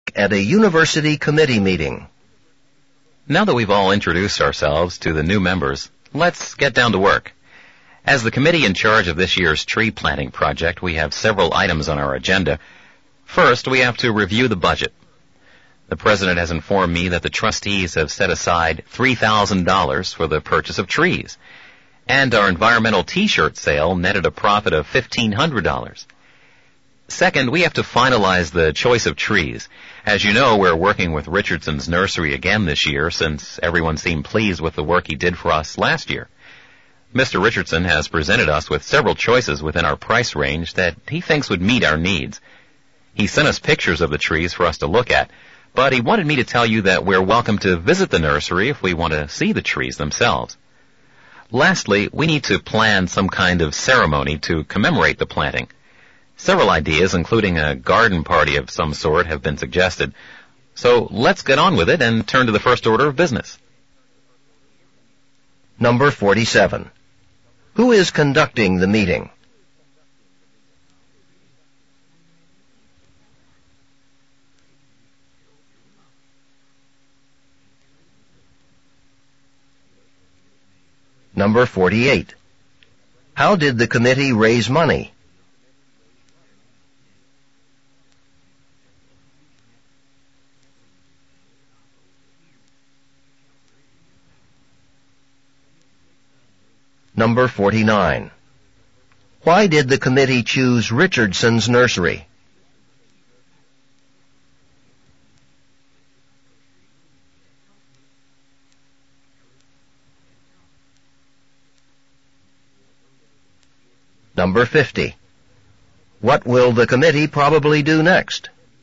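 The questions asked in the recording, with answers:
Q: How did the committee raise money?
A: By selling environmental t-shirts

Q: Why did the committee choose Richardson's Nursery?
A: Everyone was pleased with his work last year

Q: What will the committee probably do next?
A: Review the budget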